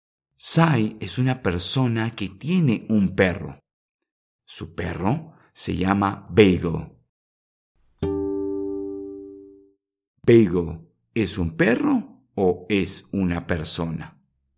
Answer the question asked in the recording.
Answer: Exacto. Bagel es un perro.